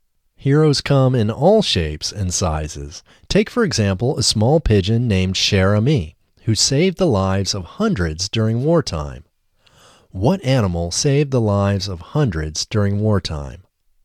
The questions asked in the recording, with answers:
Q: What animal saved the lives of hundreds during wartime?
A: A small pigeon saved the lives of hundreds during wartime.